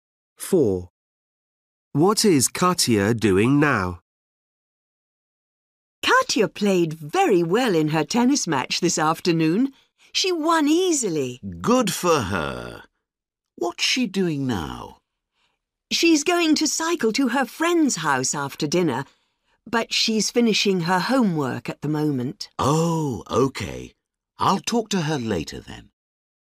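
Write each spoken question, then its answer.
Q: What is Katia doing now?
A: finishing her homework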